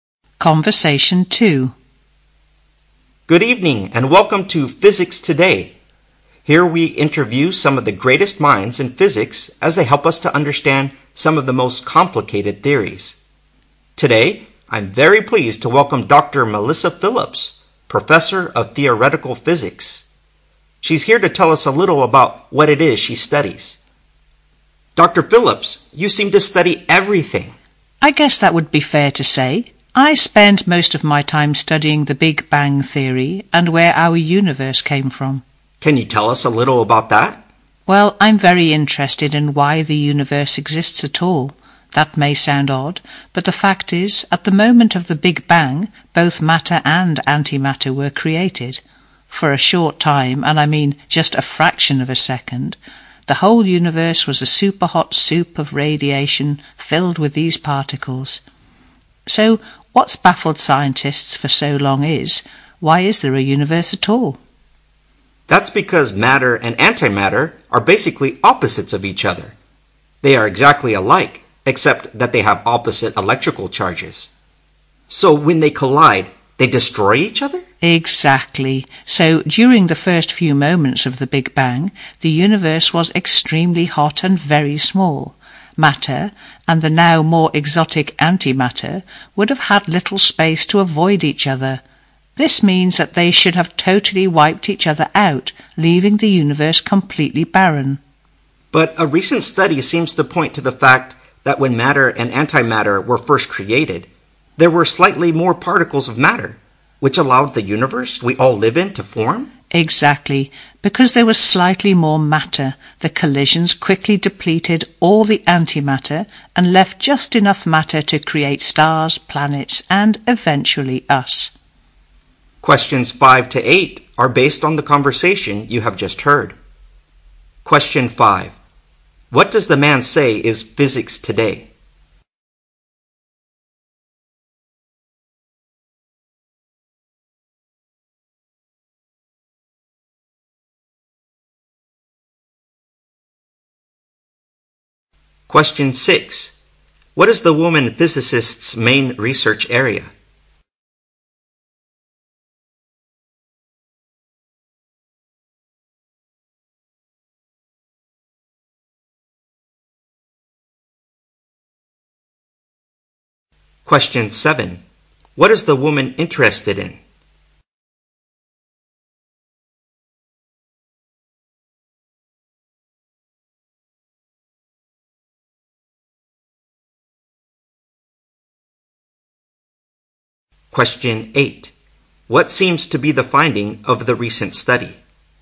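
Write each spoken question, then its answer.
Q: What does the man say is physics today?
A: A program interviewing great minds in physics

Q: What is the woman physicist's main research area?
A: The Big Bang Theory and the origin of the universe

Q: What is the woman interested in?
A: Why the universe exists at all

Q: What seems to be the finding of the recent study?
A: Slightly more matter than antimatter was created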